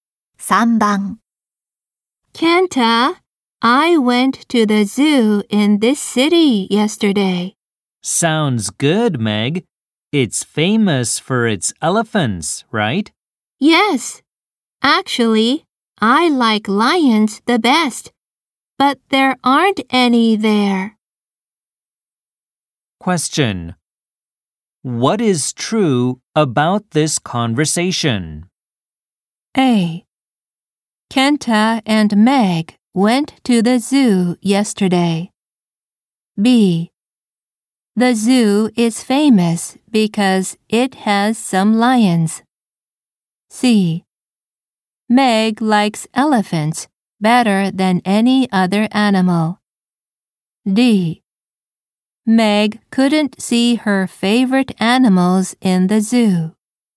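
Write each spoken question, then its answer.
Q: What is true about this conversation?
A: D: Meg couldn't see her favorite animals in the zoo.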